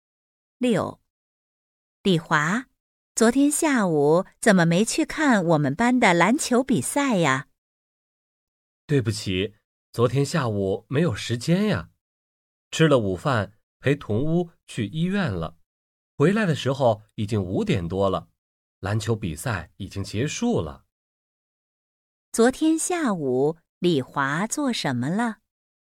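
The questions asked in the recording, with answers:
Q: 昨天下午李华做什么了?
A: 陪同屋去医院了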